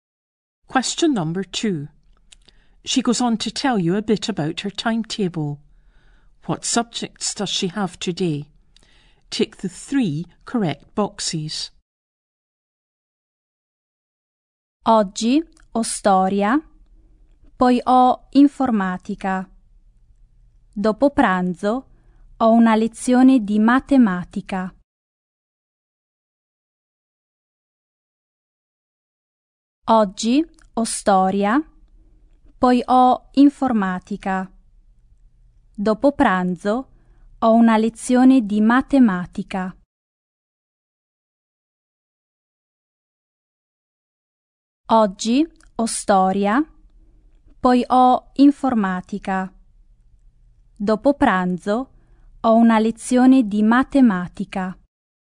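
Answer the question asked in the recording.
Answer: History, computing (IT) and maths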